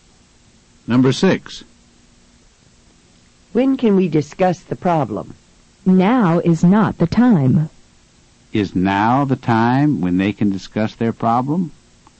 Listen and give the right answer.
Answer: No, it's not.